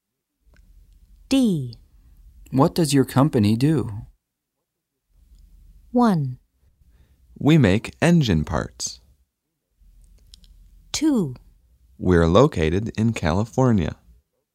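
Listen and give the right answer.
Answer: 1: We make engine parts.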